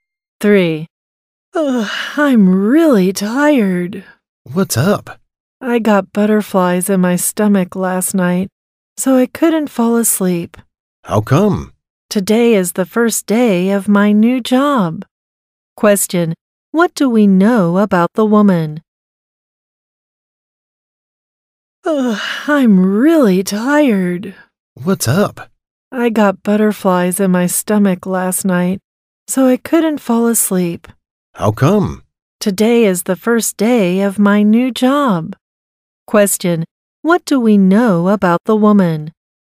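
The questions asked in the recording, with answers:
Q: What do we know about the woman?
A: She was nervous about the first day of her new job and couldn't sleep.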